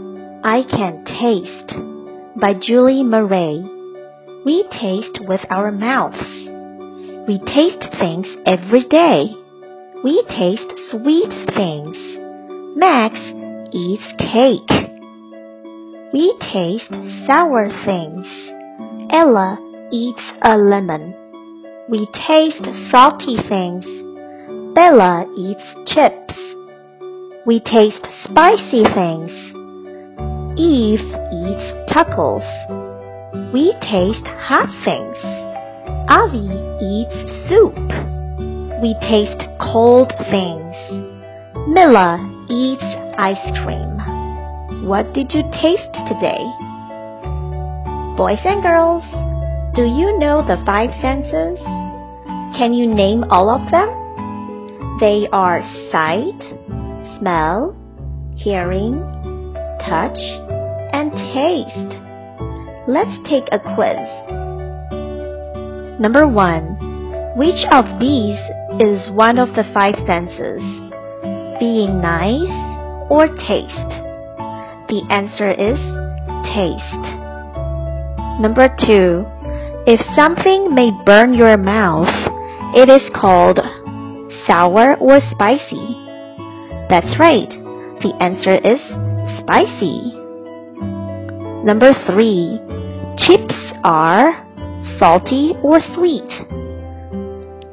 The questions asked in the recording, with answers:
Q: Number three, chips are salty or sweet?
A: The answer is salty.